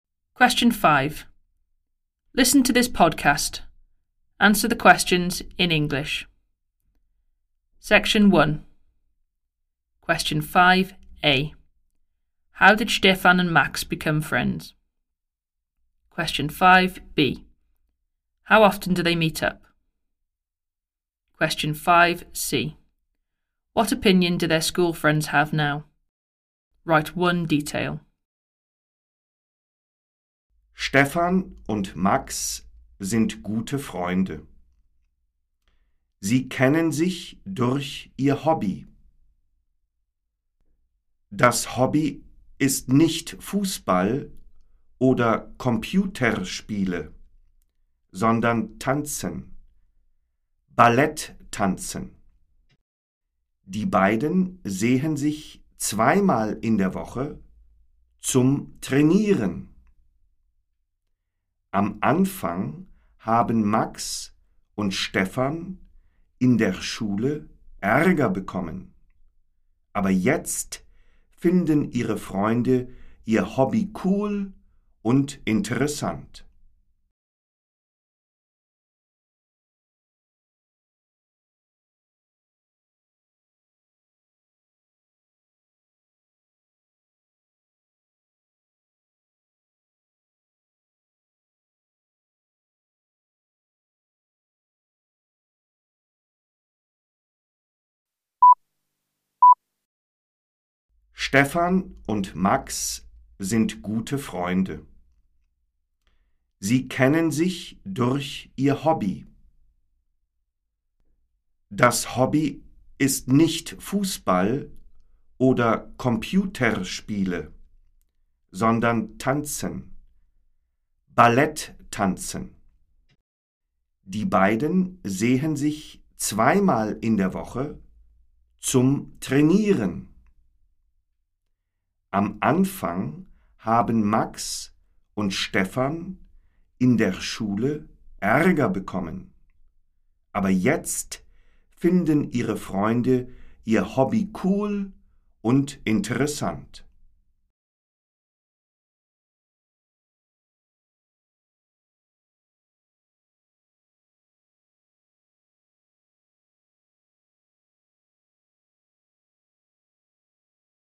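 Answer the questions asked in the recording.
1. Through their hobby, ballet dancing
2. Twice a week
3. They find their hobby cool and interesting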